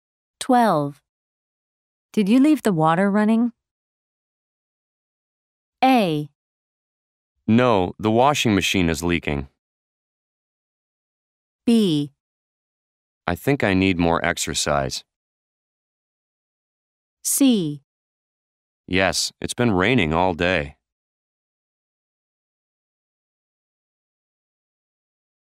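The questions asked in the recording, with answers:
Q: Did you leave the water running?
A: A: No, the washing machine is leaking.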